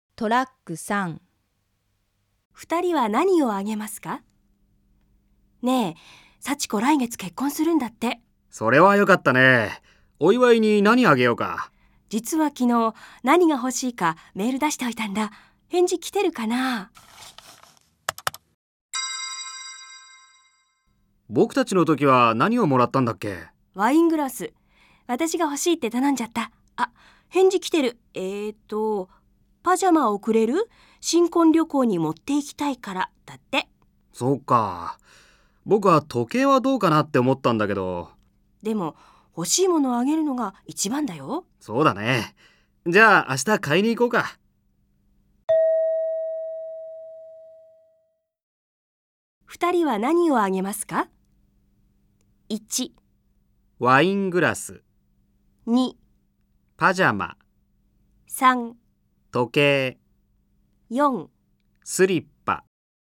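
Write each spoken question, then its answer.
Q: 二人は何をあげますか?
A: 2: パジャマ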